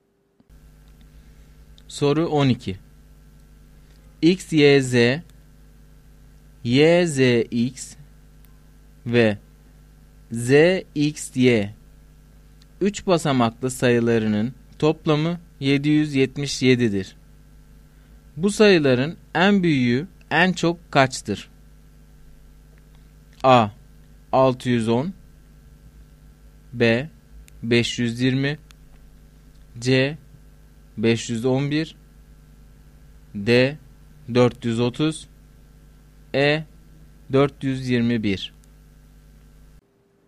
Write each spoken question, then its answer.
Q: Bu sayıların en büyüğü en çok kaçtır?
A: Doğru cevap C şıkkı.